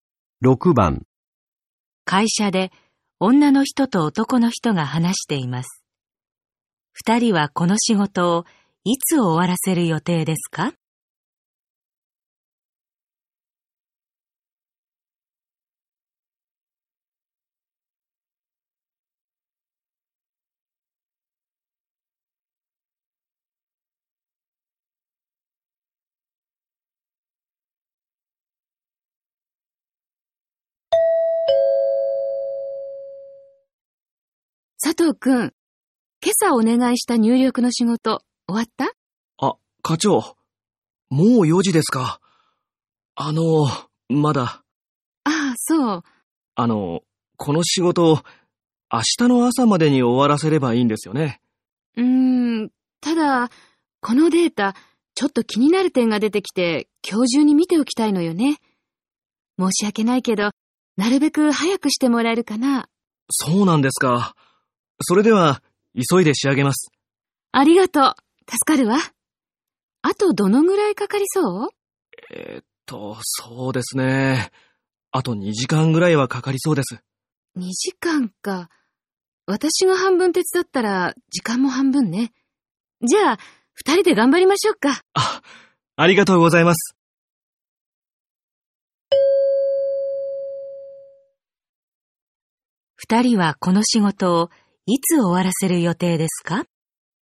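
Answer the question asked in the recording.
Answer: 今日中、2人で1時間後(5時ごろ)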